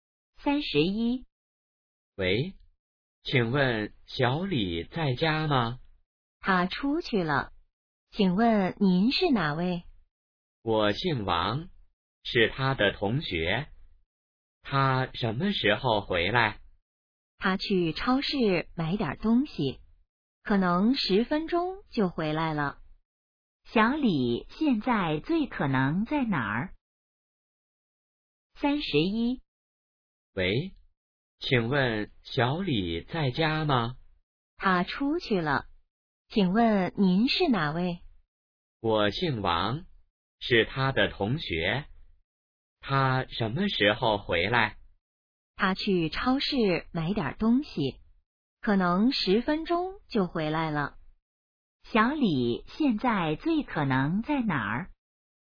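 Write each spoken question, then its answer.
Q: 小李现在最可能在哪儿?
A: 超市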